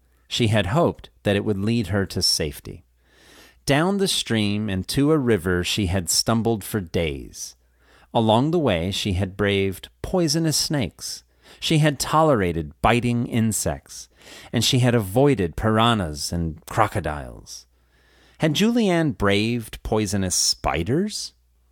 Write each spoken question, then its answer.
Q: Had Julianne braved poisonous spiders?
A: No, she had braved poisonous snakes.